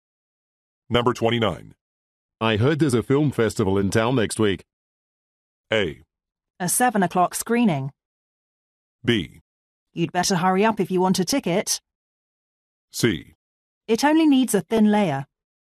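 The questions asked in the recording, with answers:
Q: I heard there's a film festival in town next week.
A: B: You'd better hurry up if you want a ticket.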